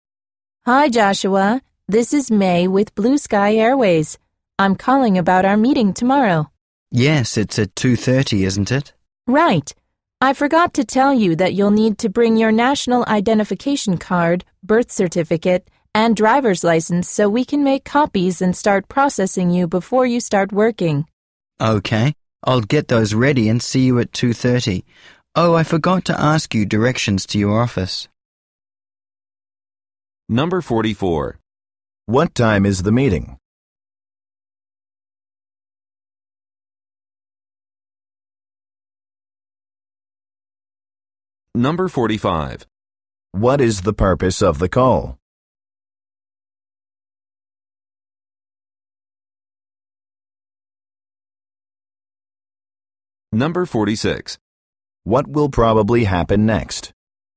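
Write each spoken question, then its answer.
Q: What time is the meeting?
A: At 2:30

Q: What is the purpose of the call?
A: To tell Joshua to bring his ID card, birth certificate and driver's license to the meeting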